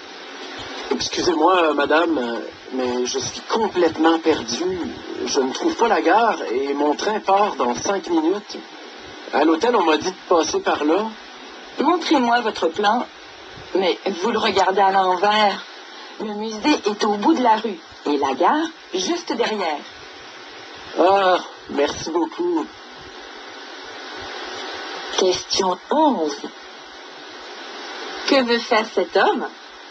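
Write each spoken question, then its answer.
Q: Que veut faire cet homme?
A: Aller à la gare pour prendre son train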